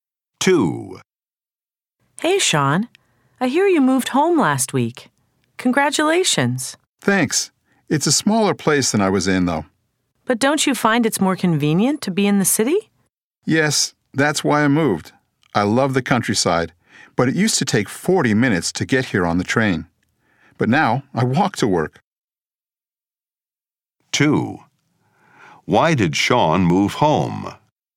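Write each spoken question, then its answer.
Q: Why did Sean move home?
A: To be in the city, closer to work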